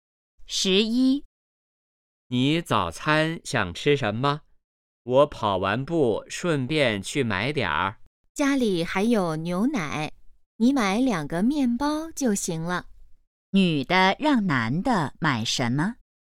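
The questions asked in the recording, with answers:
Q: 女的让男的买什么?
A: 面包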